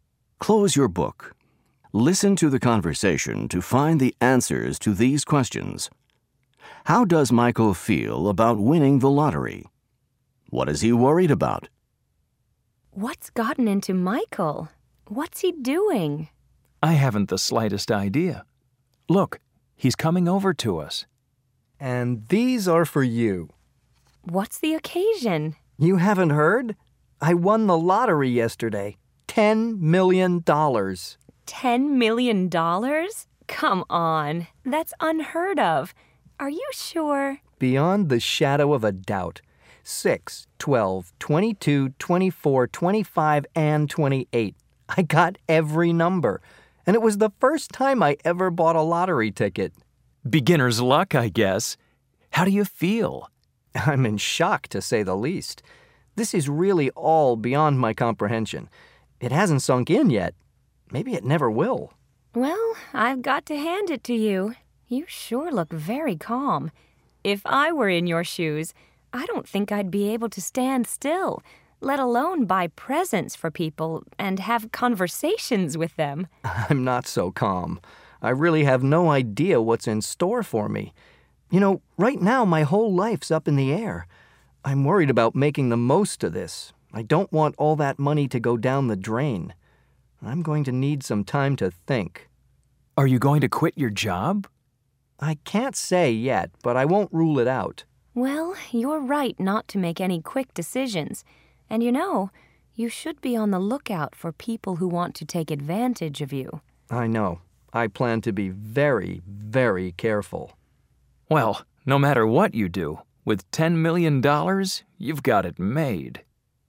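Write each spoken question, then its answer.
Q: How does Michael feel about winning the lottery?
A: He's in shock; it hasn't sunk in yet.

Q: What is he worried about?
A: Making the most of the money and not letting it go down the drain.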